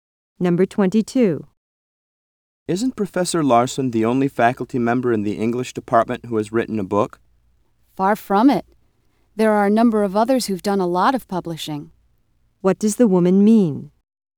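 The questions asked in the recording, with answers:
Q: What does the woman mean?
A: Many other English faculty members have published books.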